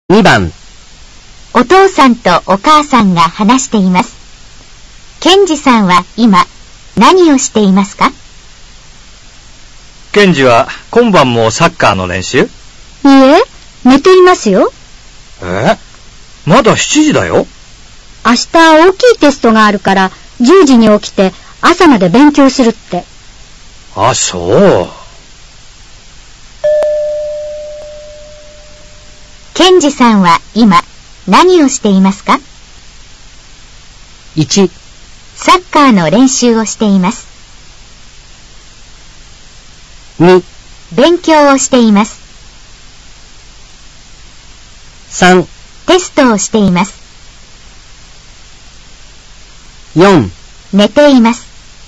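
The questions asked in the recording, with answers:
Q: ケンジさんは今何をしていますか?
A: 4: 寝ています。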